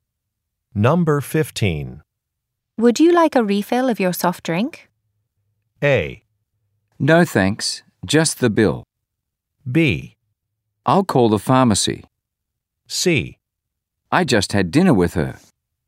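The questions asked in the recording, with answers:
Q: Would you like a refill of your soft drink?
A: A: No thanks, just the bill.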